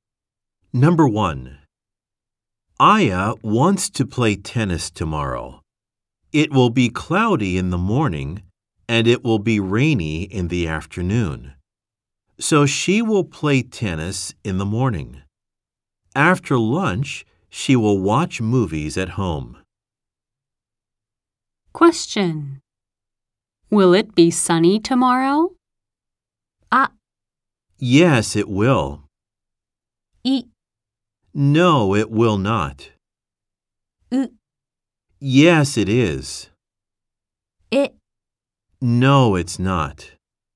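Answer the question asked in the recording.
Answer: い: No, it will not.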